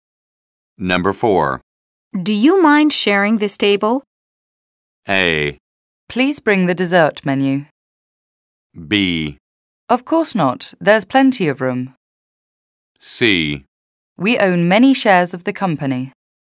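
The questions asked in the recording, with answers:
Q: Do you mind sharing this table?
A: B: Of course not. There's plenty of room.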